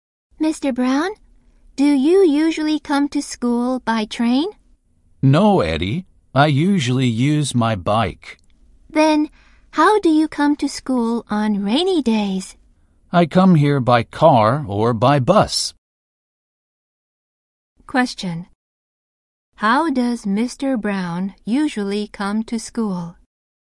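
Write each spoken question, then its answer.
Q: How does Mr. Brown usually come to school?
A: By bike.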